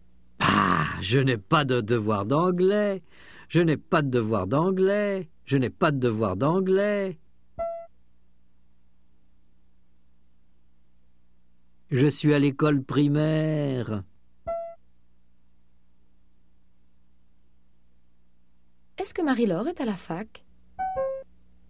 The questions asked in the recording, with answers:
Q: Est-ce que Marie-Laure est à la fac?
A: Non, elle est à l'école primaire.